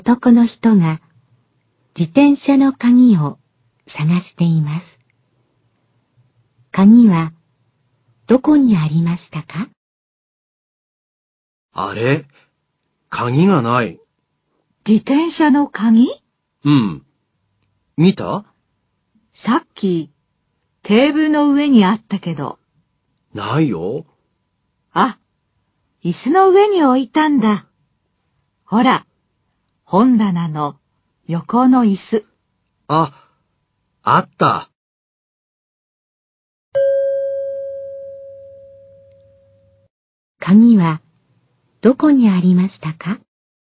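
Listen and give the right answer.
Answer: 本棚の横の椅子の上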